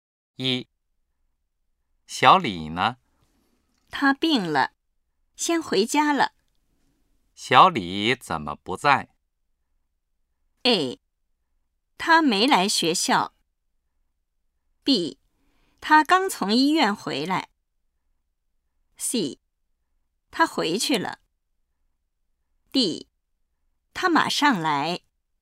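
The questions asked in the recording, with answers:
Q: 小李怎么不在?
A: C: 他回去了。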